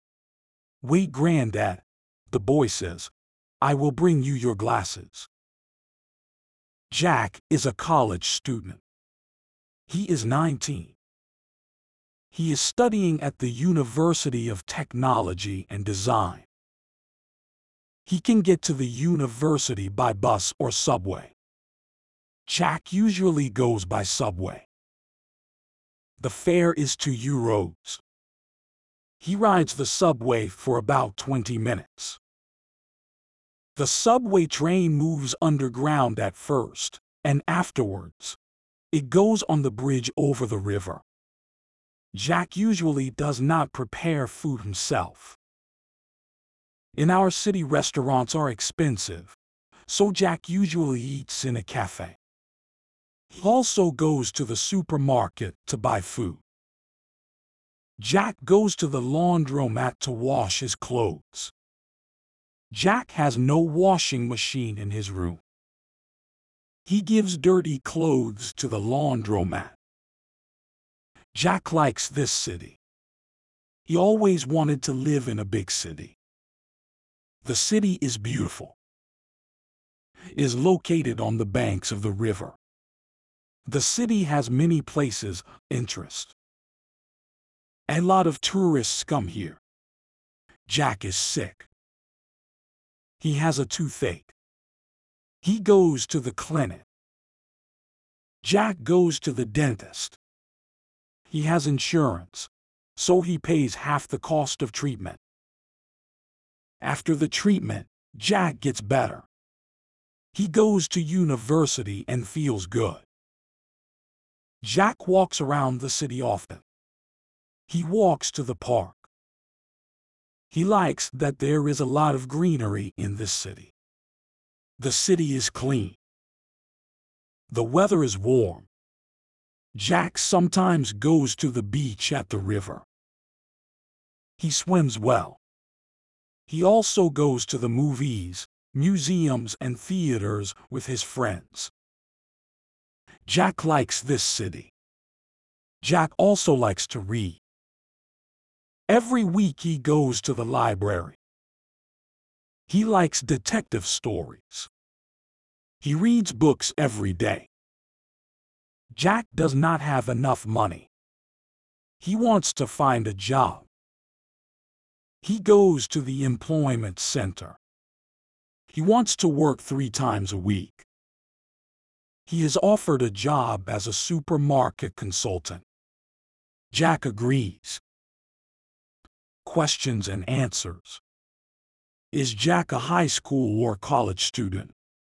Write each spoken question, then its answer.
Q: Is Jack a high school or college student?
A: Jack is a college student.